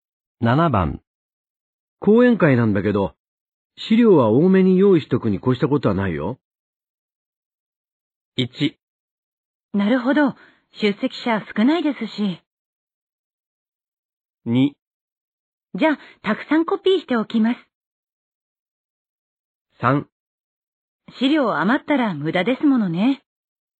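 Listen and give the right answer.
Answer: 2: じゃあ、たくさんコピーしておきます。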